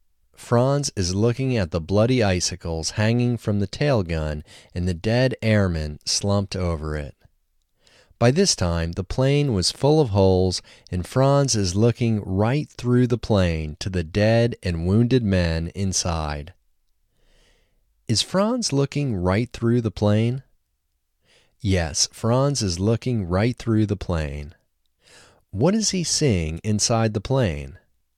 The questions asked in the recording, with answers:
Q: What is he seeing inside the plane?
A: He is seeing the dead and wounded men inside the plane.